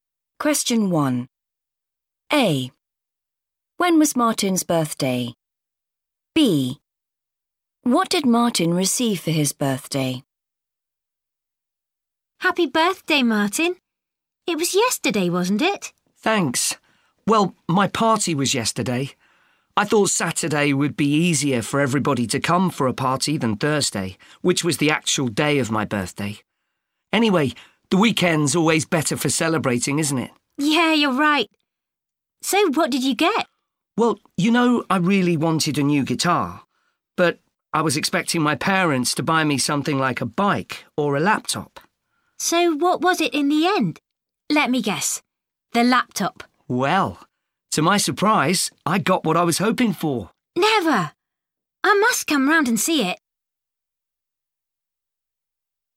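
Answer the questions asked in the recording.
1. Thursday
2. a new guitar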